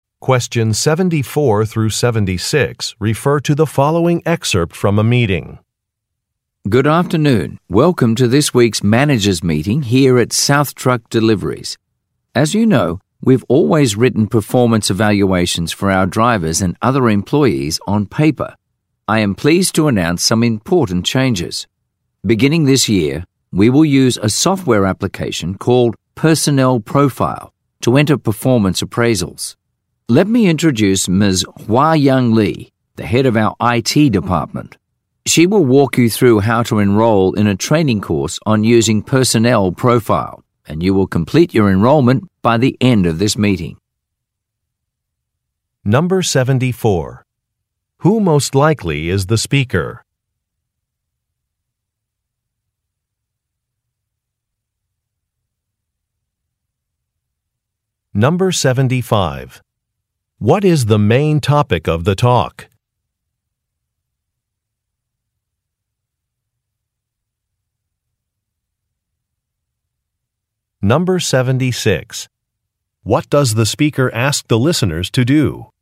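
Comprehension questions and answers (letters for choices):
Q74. Who most likely is the speaker?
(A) A salesperson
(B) A manager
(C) A safety inspector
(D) A software developer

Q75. What is the main topic of the talk?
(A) A delivery route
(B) A corporate merger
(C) Performance reviews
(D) Hiring procedures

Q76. What does the speaker ask the listeners to do?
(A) Pass along some information to workers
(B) Sign up for a training course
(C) Get some information from customers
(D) Talk with employees about their goals for the year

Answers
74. B
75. C
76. B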